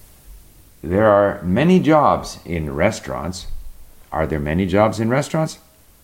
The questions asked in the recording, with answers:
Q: Are there many jobs in restaurants?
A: Yes, there are many jobs in restaurants.